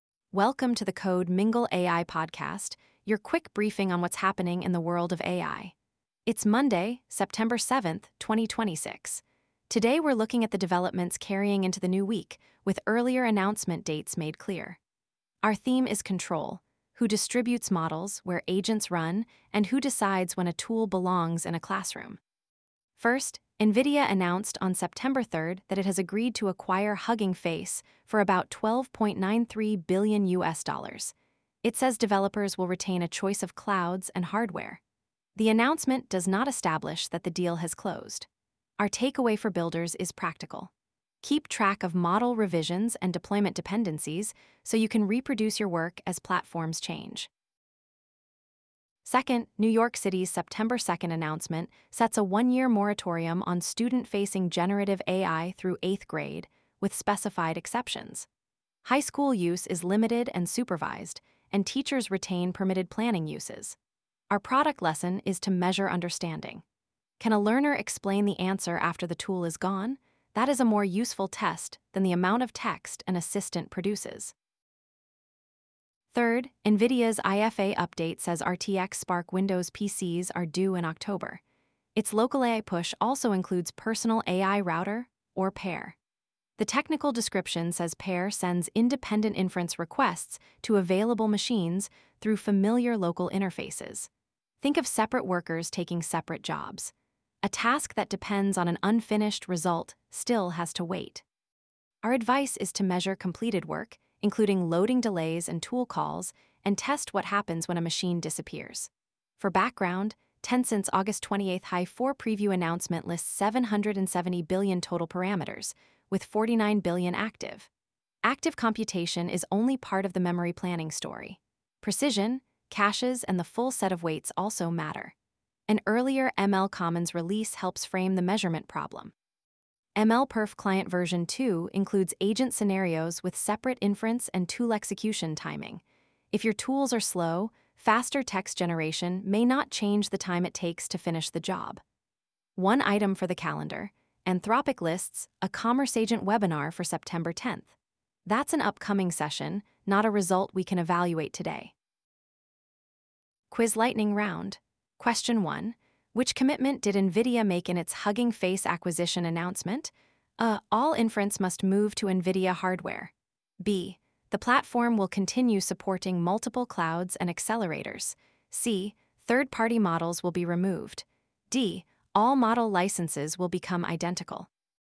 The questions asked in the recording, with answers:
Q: Which commitment did NVIDIA make in its Hugging Face acquisition announcement?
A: The answer is B.